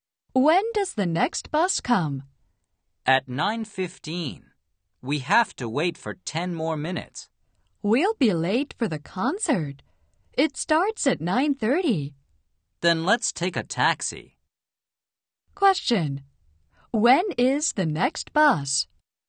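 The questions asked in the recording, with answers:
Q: When is the next bus?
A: At 9:15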